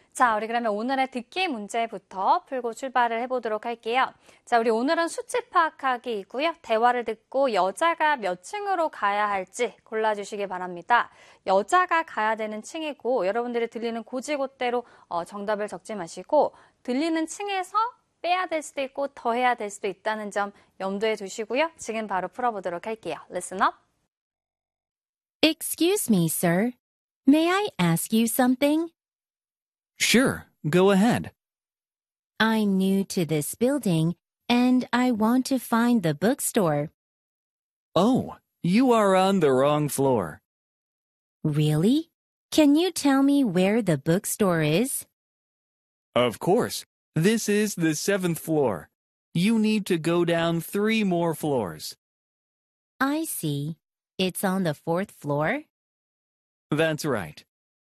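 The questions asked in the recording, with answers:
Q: 대화를 듣고 여자가 몇 층으로 가야 할지 골라주시기 바랍니다.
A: 4층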